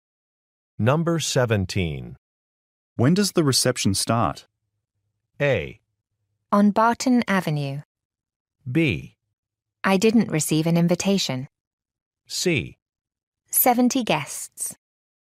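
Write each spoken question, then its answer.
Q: When does the reception start?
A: B: I didn't receive an invitation.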